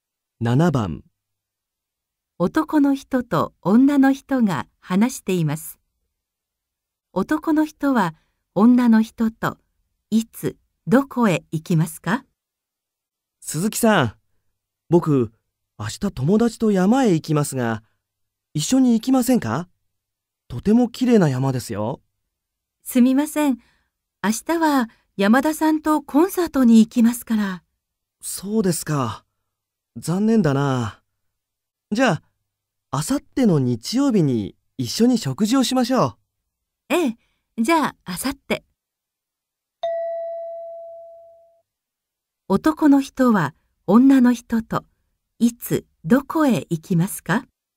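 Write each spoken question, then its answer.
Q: 男の人は女の人といつどこへ行きますか?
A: あさっての日曜日に食事に行きます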